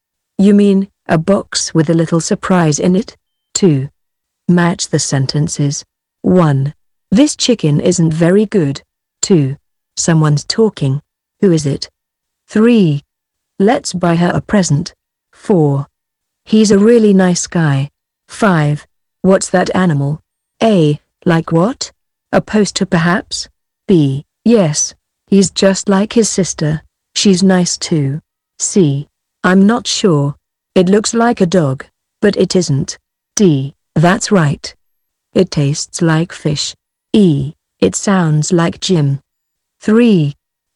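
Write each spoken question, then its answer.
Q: This chicken isn't very good.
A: D: That's right. It tastes like fish.

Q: Someone's talking. Who is it?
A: E: It sounds like Jim.

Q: Let's buy her a present.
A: A: Like what? A poster perhaps?

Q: He's a really nice guy.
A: B: Yes, he's just like his sister. She's nice too.

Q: What's that animal?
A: C: I'm not sure. It looks like a dog, but it isn't.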